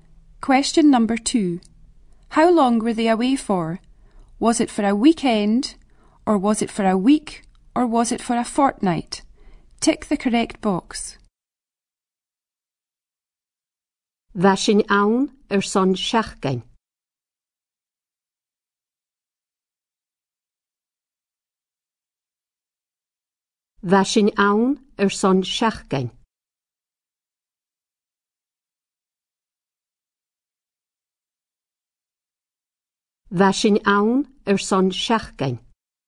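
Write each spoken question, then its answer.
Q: How long were they away for?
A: a week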